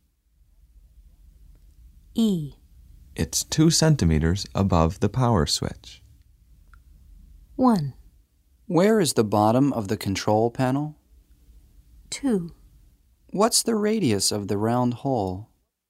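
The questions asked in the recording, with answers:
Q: It's 2 centimeters above the power switch.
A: 1: Where is the bottom of the control panel?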